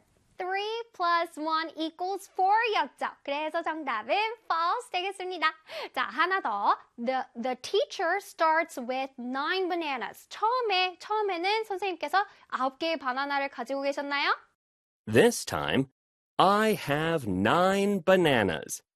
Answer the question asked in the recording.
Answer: I have 9 bananas. 그래서 정답은 O가 되겠습니다.